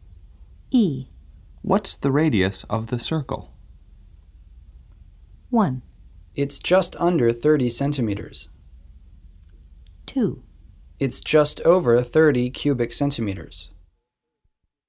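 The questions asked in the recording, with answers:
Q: What's the radius of the circle?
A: 1: It's just under 30 centimeters.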